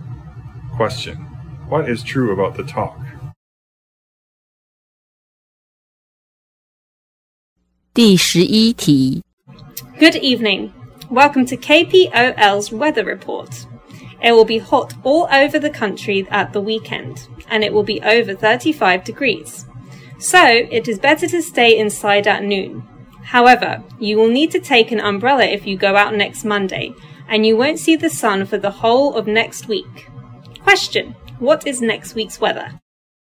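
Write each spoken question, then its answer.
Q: what is next week's weather?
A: Rainy, with no sun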